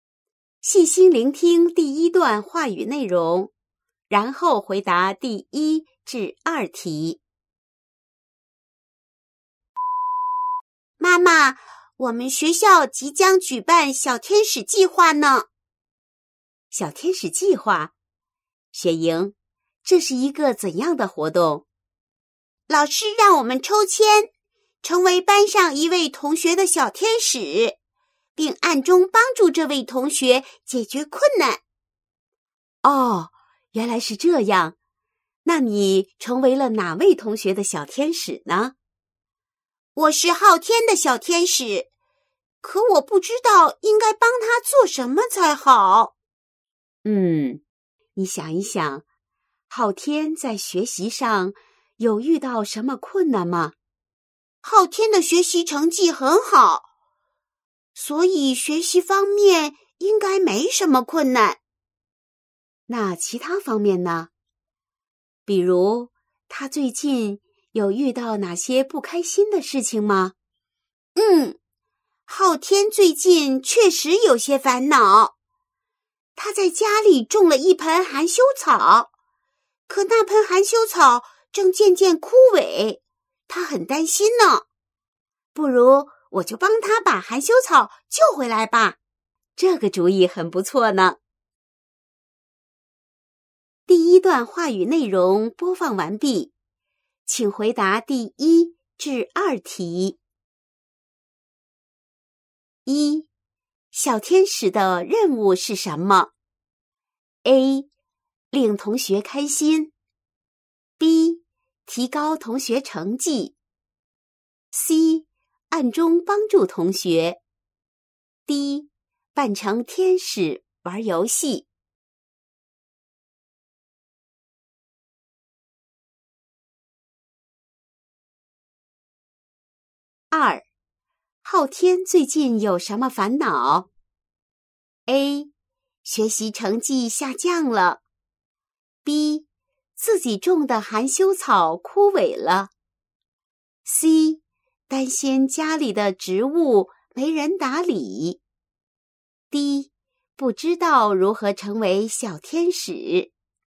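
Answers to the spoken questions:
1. C: 暗中帮助同学
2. B: 自己种的含羞草枯萎了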